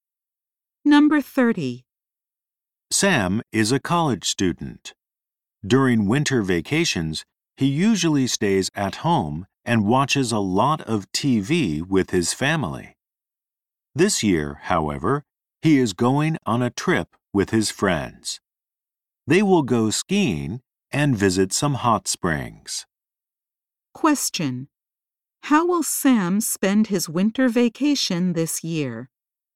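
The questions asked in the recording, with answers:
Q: How will Sam spend his winter vacation this year?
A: He will go on a trip with his friends to ski and visit hot springs.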